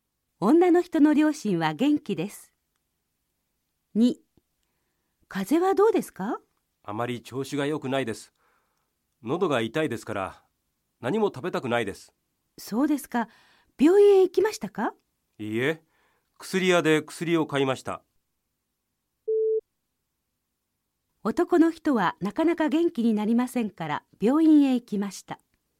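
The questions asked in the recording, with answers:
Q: 男の人はなかなか元気になりませんから病院へ行きました。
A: いいえ、正しくない(病院へ行かずに、薬屋で薬を買った)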